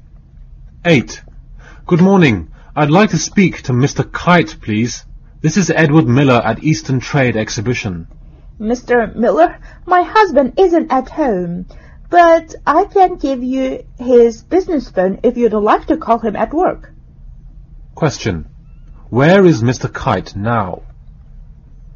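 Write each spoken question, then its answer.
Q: Where is Mr. Kite now?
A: At work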